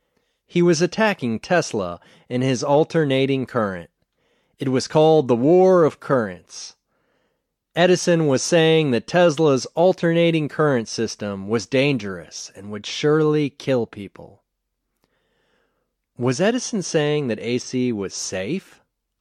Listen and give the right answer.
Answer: No, Edison wasn't saying that AC was safe.